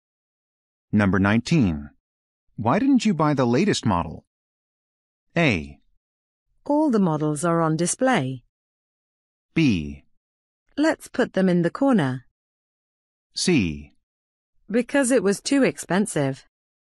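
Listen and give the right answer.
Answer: C: Because it was too expensive.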